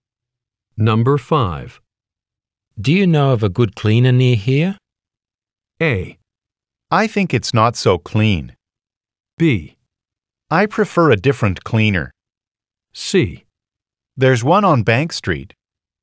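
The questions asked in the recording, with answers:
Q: Do you know of a good cleaner near here?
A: C: There's one on Bank Street.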